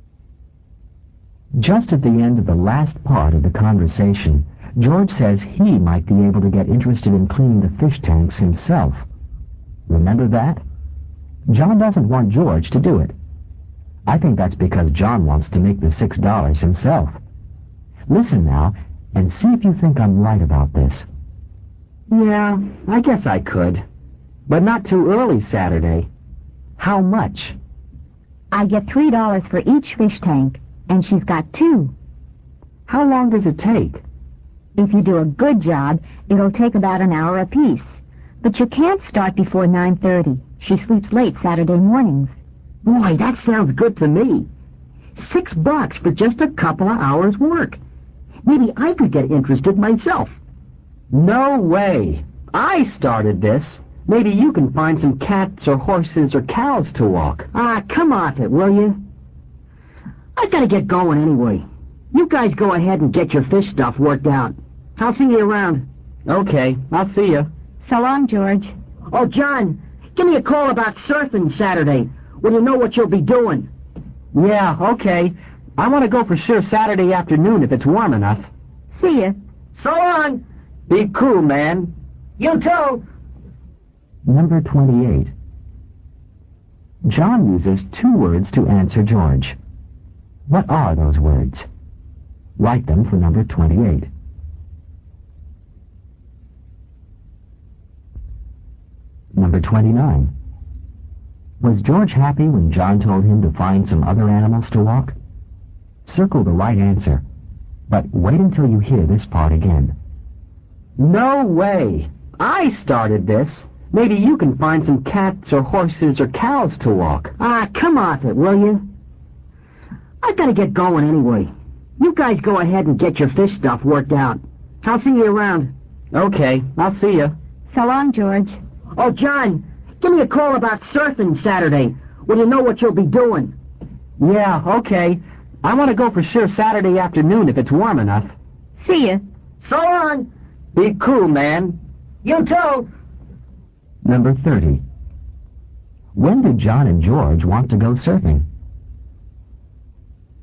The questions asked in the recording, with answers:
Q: What are those words?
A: Number 28, no way.

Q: When did John and George want to go surfing?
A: Number 30, Saturday afternoon.